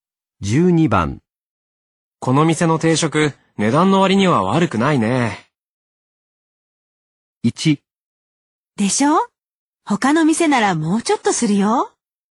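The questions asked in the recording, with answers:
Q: 店の定食、値段の割には悪くないね。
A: 1: でしょ他の店ならもうちょっとするよ。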